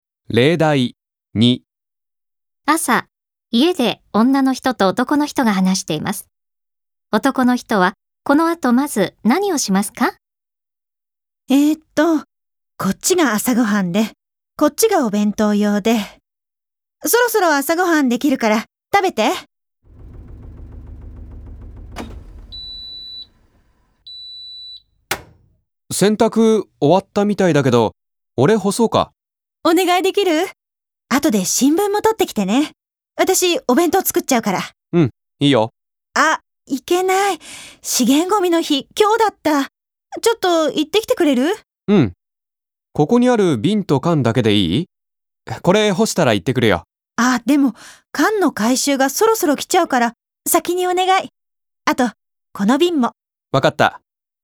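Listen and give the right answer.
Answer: 資源ゴミ(缶と瓶)を出しに行く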